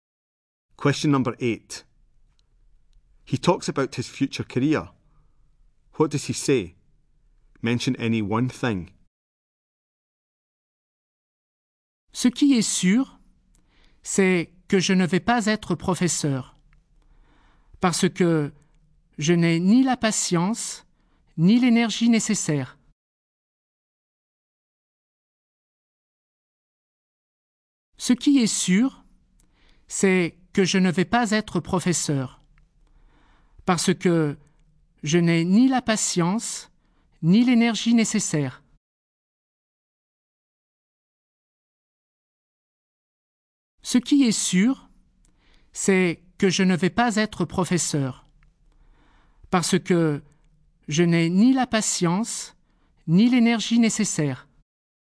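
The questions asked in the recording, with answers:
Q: What does he say? Mention any one thing.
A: He won't be a teacher; he doesn't have the patience or energy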